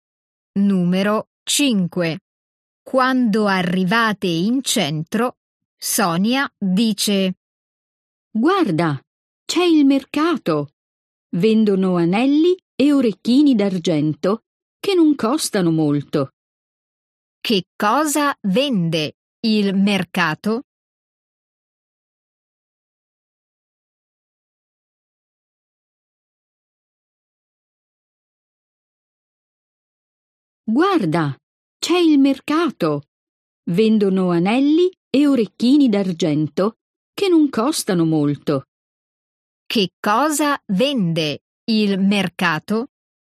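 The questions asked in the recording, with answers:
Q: Che cosa vende il mercato?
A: anelli e orecchini d'argento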